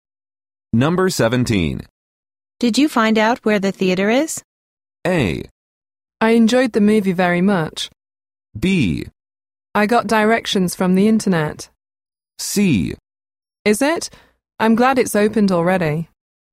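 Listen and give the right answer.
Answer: B: I got directions from the internet.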